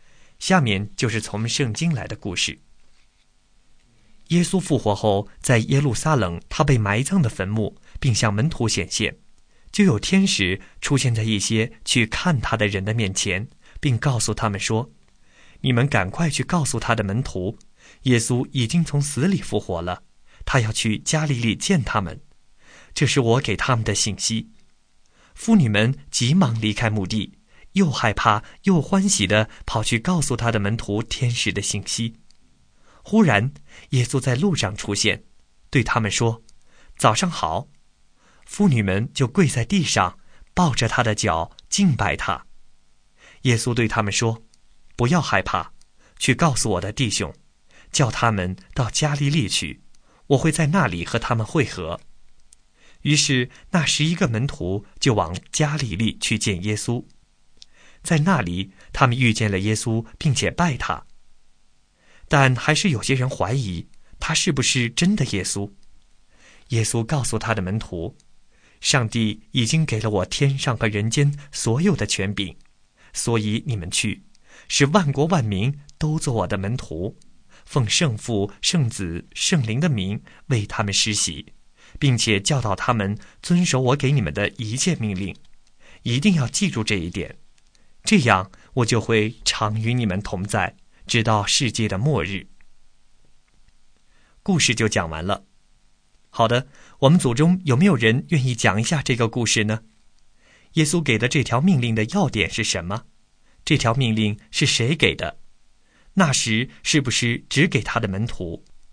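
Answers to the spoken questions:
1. 去使万国万民都做他的门徒,为他们施洗,教导他们遵守他的命令
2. 耶稣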